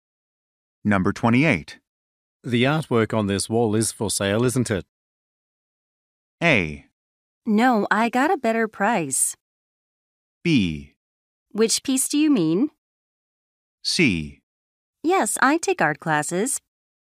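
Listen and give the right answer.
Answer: B: Which piece do you mean?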